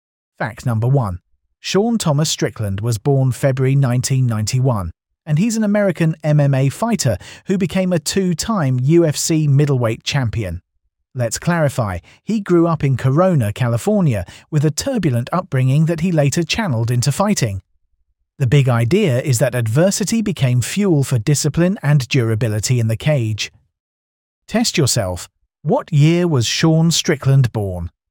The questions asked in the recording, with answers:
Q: What year was Sean Strickland born?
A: Correct answer, 1991.